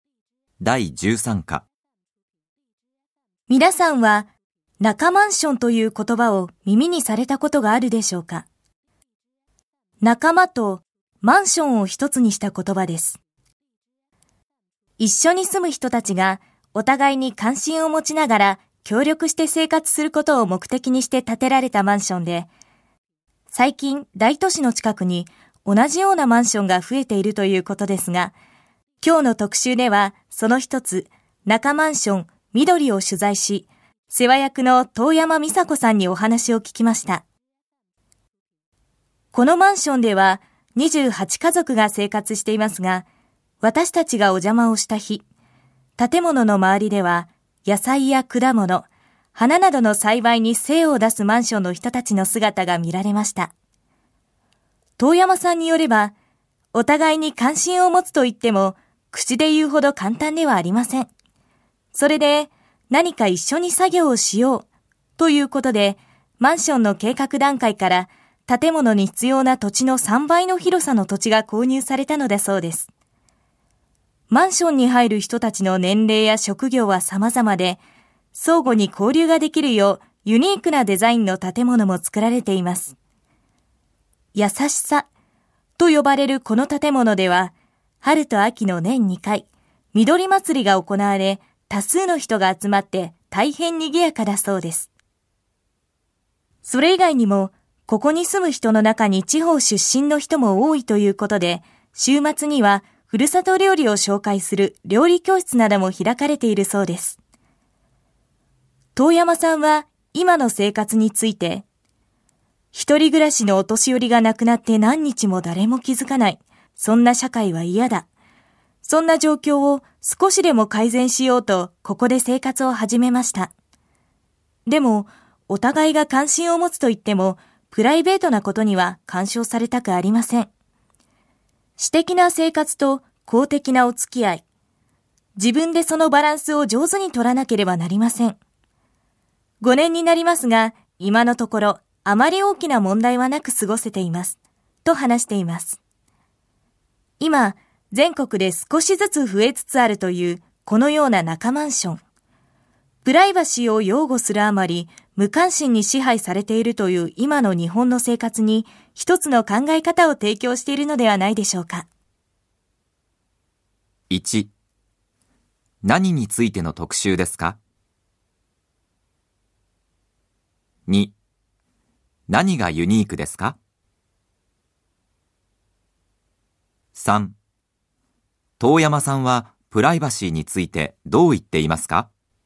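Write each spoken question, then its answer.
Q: 何についての特集ですか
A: 仲間マンション(協力して生活するためのマンション)

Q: 遠山さんはプライバシーについてどう言っていますか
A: プライベートなことには干渉されたくない。私的な生活と公的な付き合いのバランスを自分で上手に取らなければならない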